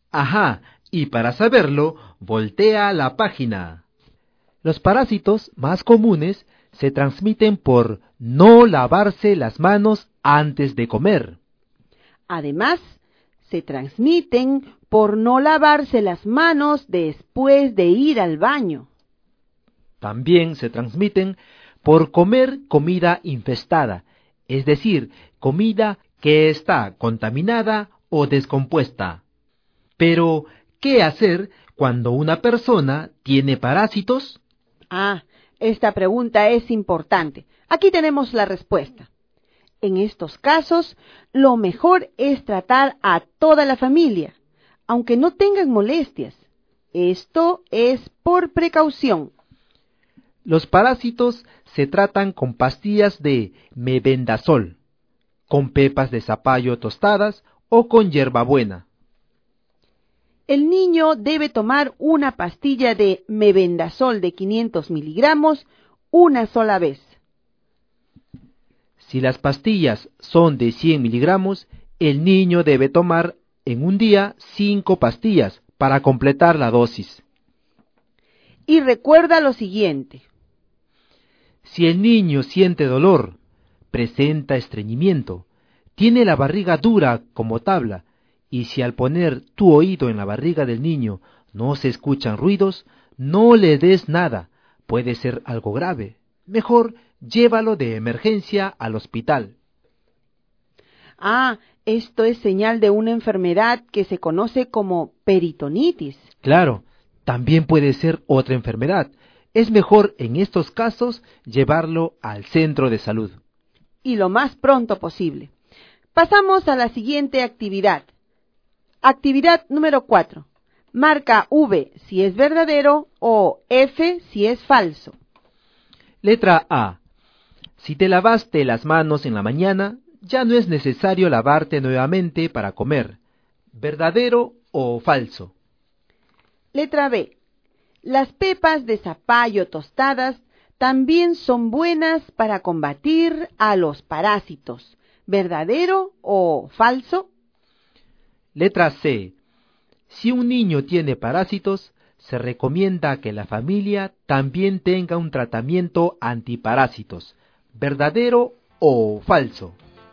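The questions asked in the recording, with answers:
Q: Letra A. Si te lavaste las manos en la mañana, ya no es necesario lavarte nuevamente para comer.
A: Falso

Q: Letra B. Las pepas de zapallo tostadas también son buenas para combatir a los parásitos.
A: Verdadero

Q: Letra C. Si un niño tiene parásitos, se recomienda que la familia también tenga un tratamiento antiparásitos.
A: Verdadero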